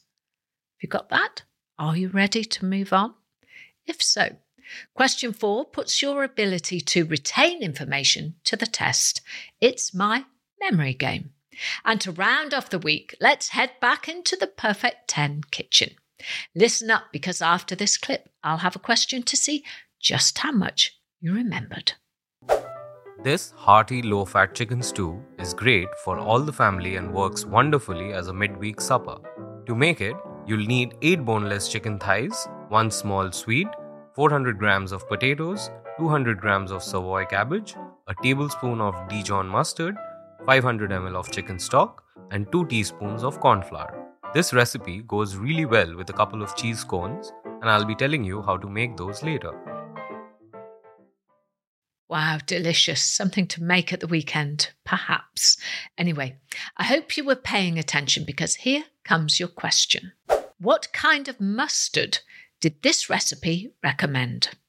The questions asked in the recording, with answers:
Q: What kind of mustard did this recipe recommend?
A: And the answer I was looking for was Dijon mustard.